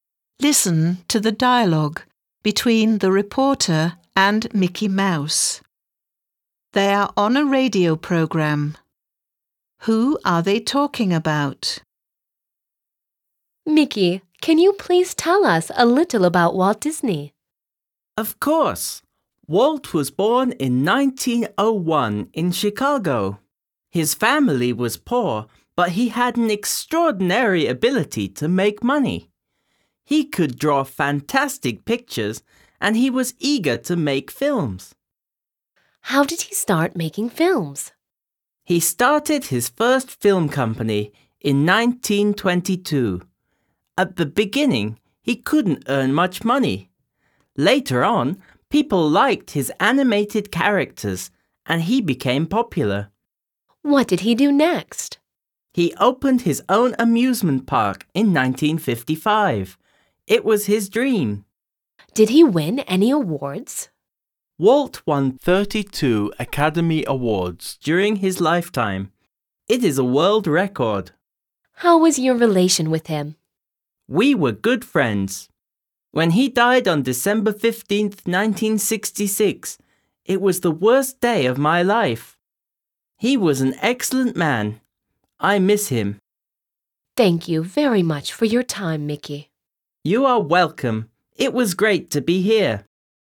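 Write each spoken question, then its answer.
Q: Who are they talking about?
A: Walt Disney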